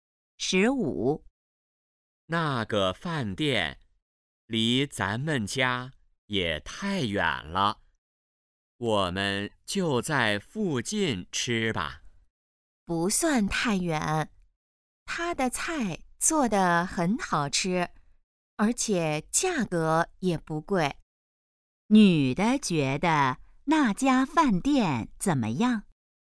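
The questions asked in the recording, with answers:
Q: 女的觉得那家饭店怎么样?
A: 菜好吃,价格不贵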